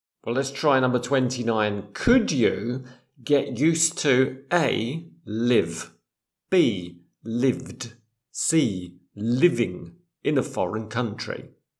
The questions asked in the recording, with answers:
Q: Could you get used to A, live, B, lived, C, living in a foreign country?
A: C, could you get used to living in a foreign country?